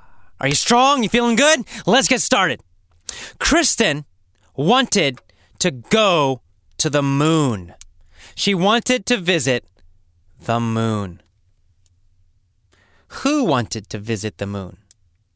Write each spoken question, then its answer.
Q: Who wanted to visit the moon?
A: Well, Kristen did.